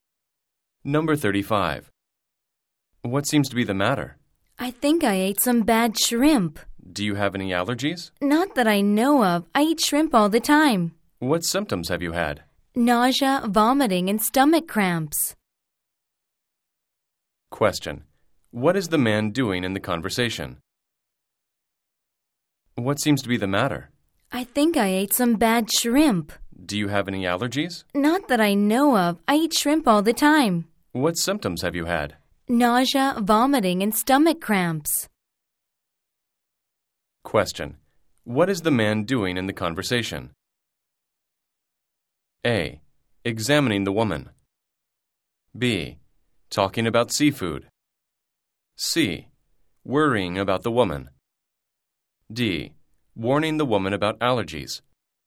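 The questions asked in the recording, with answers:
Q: What is the man doing in the conversation?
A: A: Examining the woman.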